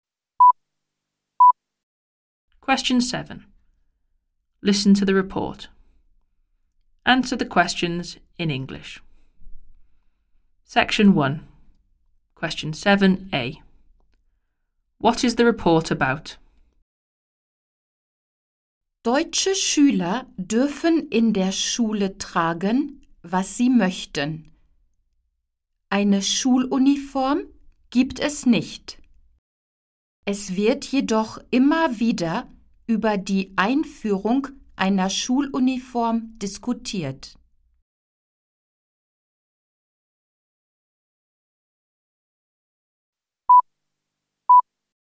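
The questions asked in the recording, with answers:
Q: What is the report about?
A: School uniform (German pupils wear what they like; debate about introducing uniform)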